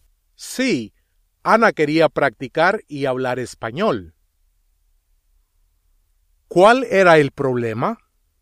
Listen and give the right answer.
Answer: Ana no quería ir a la escuela.